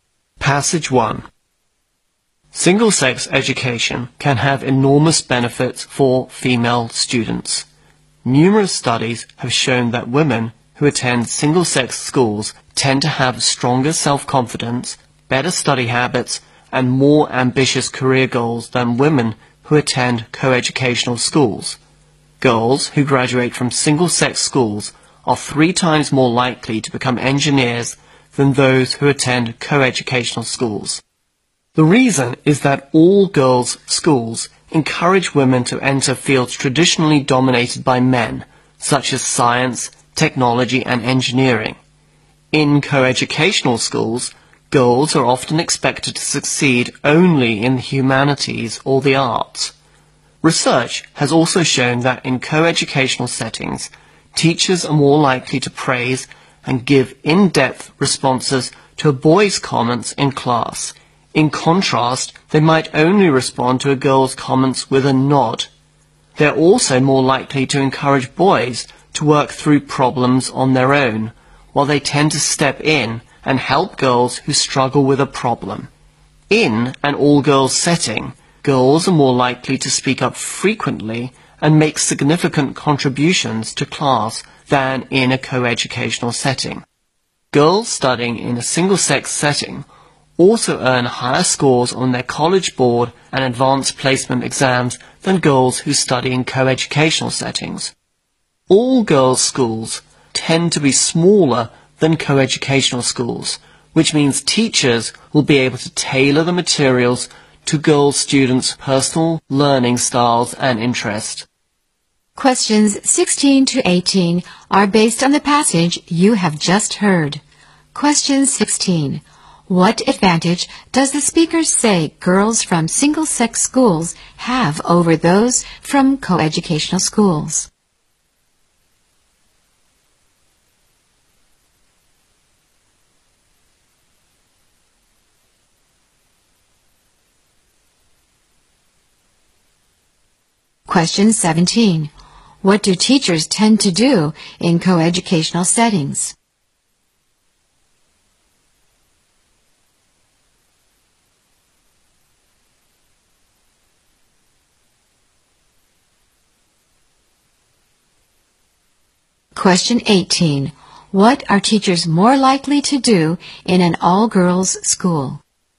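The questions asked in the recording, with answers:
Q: What advantage does the speaker say girls from single-sex schools have over those from co-educational schools?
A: Stronger self-confidence, better study habits and more ambitious career goals

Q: What do teachers tend to do in co-educational settings?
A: Give boys more praise and in-depth responses

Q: What are teachers more likely to do in an all-girls school?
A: Tailor materials to students' learning styles and interests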